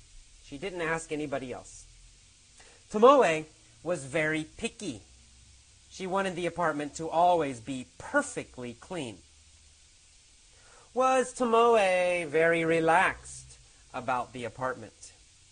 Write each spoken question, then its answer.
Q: Was Tomoe very relaxed about the apartment?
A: No. She was not relaxed. She was very picky.